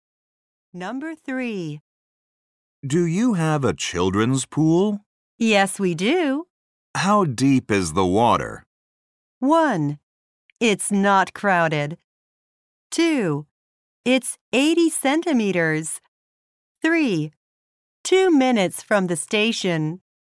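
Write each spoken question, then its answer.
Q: How deep is the water?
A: 2: It's 80 centimeters.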